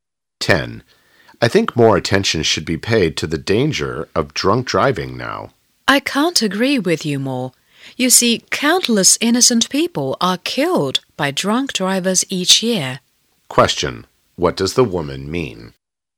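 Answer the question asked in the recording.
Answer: She agrees that drunk driving needs more attention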